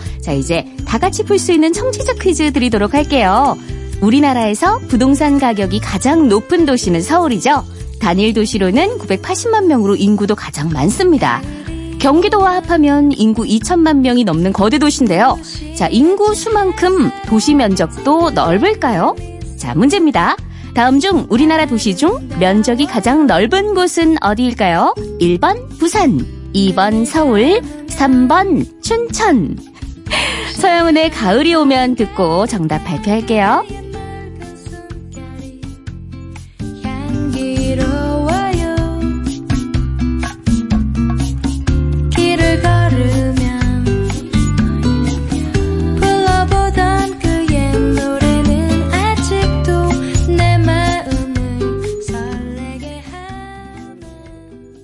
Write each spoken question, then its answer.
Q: 다음 중 우리나라 도시 중 면적이 가장 넓은 곳은 어디일까요?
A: 정답 3번 춘천.